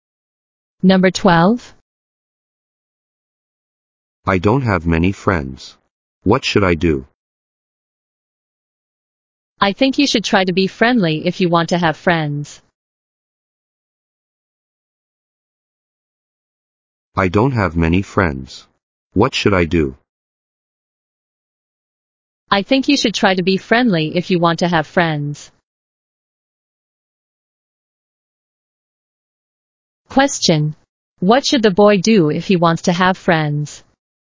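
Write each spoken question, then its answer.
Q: What should the boy do if he wants to have friends?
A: Try to be friendly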